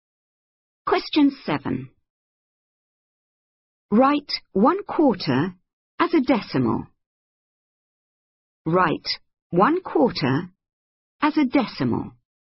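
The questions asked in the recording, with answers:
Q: Write 1/4 as a decimal.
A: 0.25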